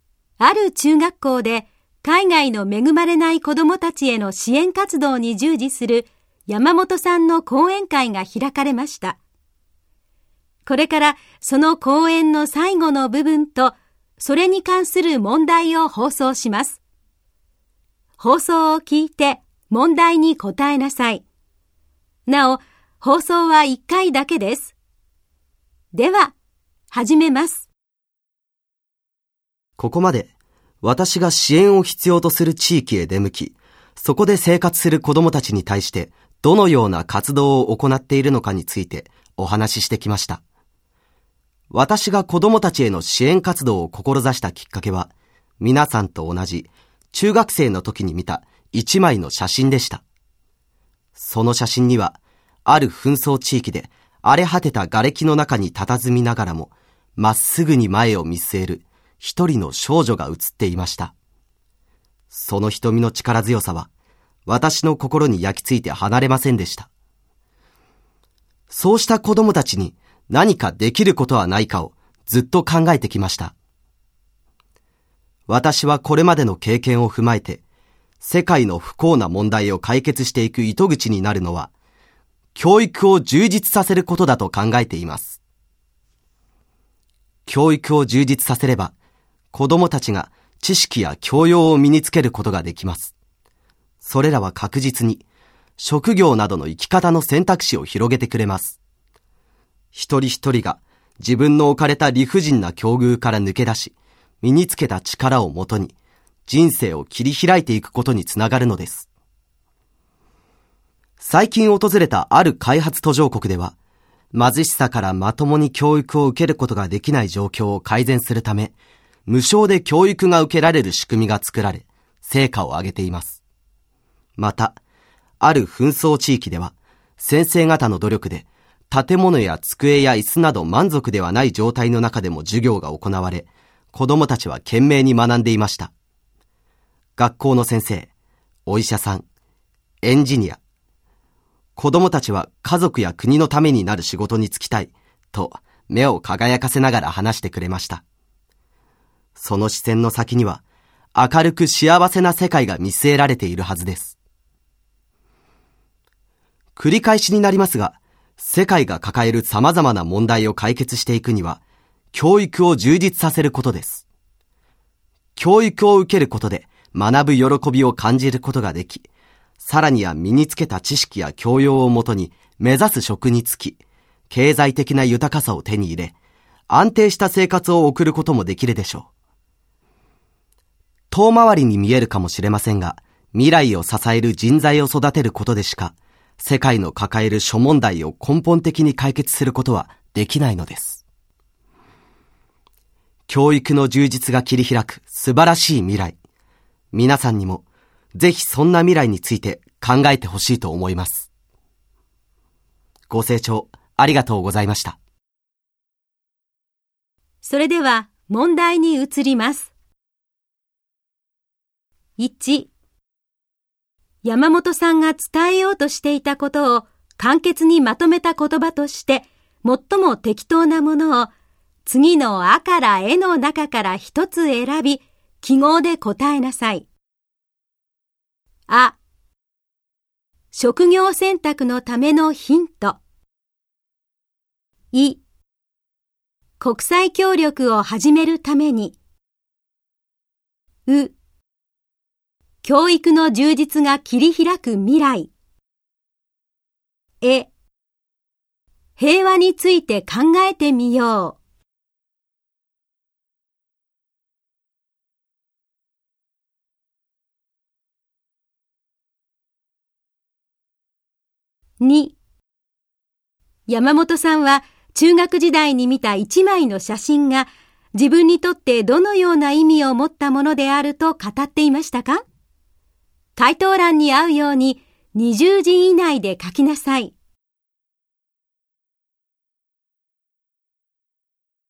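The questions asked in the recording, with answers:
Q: 山本さんが伝えようとしていたことを簡潔にまとめた言葉として最も適当なものを次のあからえの中から一つ選び記号で答えなさい。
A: う: 教育の充実が切り開く未来

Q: 山本さんは中学時代に見た一枚の写真が自分にとってどのような意味を持ったものであると語っていましたか?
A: 子どもたちへの支援活動を志したきっかけ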